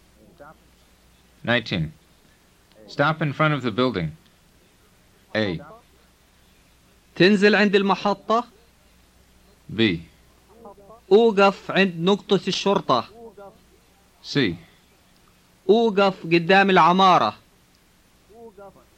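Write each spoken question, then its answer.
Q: Stop in front of the building.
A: C: أوقف قدام العمارة.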